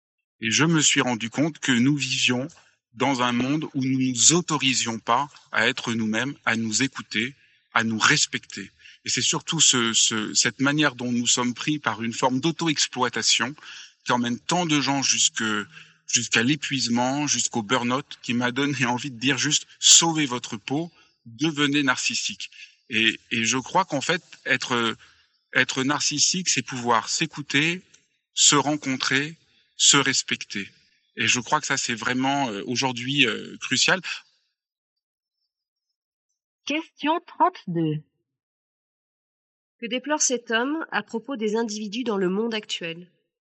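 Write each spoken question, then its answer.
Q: Que déplore cet homme à propos des individus dans le monde actuel ?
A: Ils ne s'autorisent pas à être eux-mêmes, à s'écouter et se respecter, et s'auto-exploitent jusqu'à l'épuisement.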